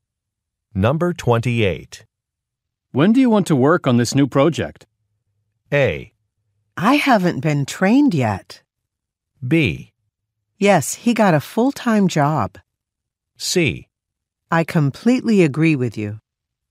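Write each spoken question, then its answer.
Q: When do you want to work on this new project?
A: A: I haven't been trained yet.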